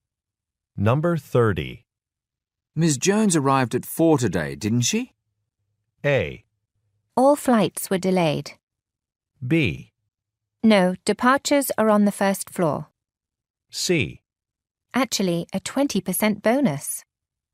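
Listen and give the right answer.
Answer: A: All flights were delayed.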